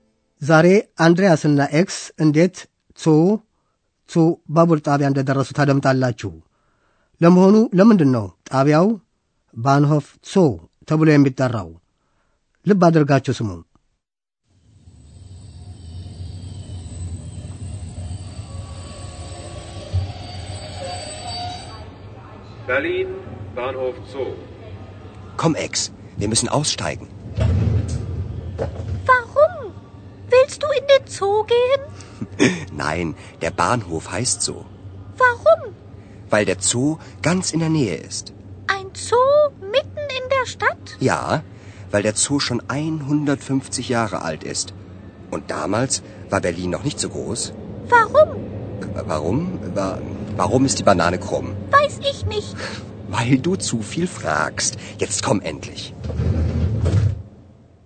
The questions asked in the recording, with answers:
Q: ለመሆኑ ለምንድን ነው ጣቢያው ባንሆፍ ጾ ተብሎ የሚጠራው?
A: ባቡር ጣቢያው ባንሆፍ ሶ የሚባለው አጠገቡ አንድ የአራዊት መከማቻ ስለሚገኝ ነው።